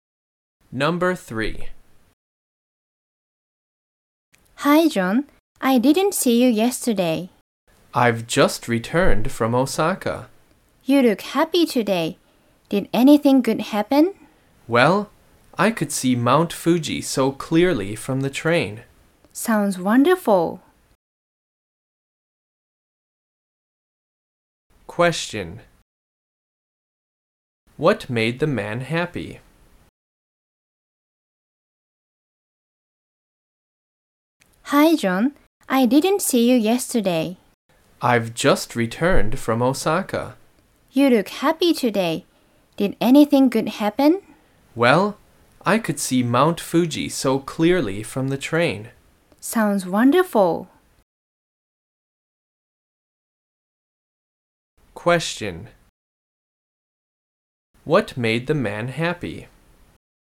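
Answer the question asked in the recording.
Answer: He could see Mount Fuji clearly from the train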